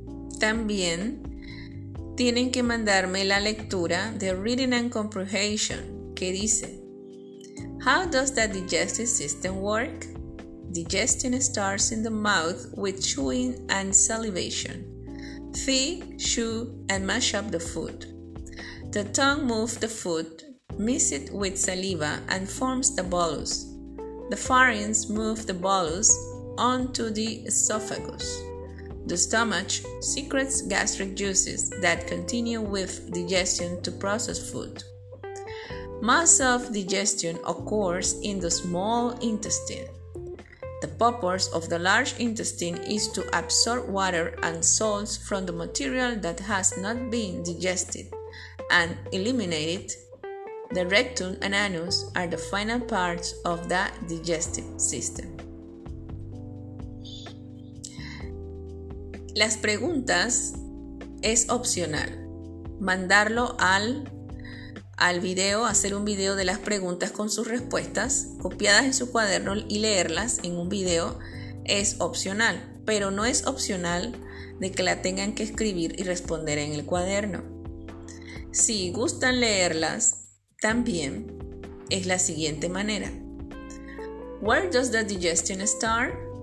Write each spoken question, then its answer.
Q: Where does the digestion start?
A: The digestion starts in the mouth with chewing and salivation.